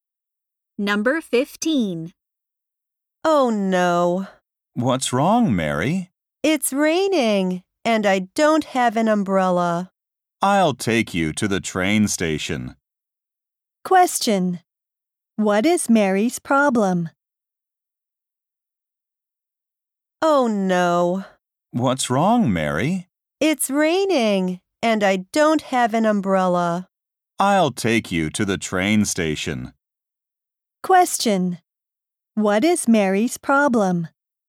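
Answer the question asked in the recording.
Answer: It's raining and she doesn't have an umbrella.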